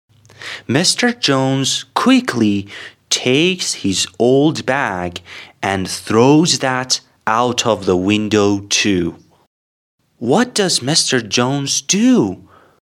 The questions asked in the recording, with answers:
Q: What does Mr. Jones do?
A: He takes his old bag and throws that out of the window too.